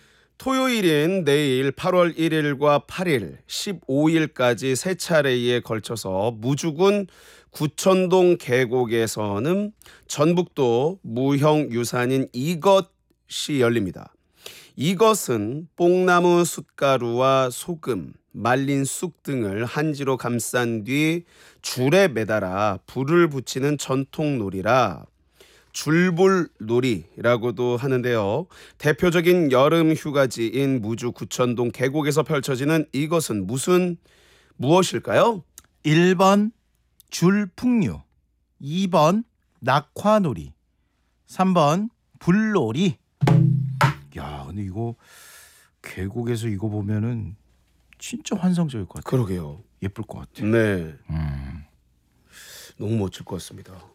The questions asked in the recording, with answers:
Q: 대표적인 여름 휴가지인 무주 구천동 계곡에서 펼쳐지는 이것은 무슨 무엇일까요?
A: 2번 낙화놀이가 정답이 되겠습니다.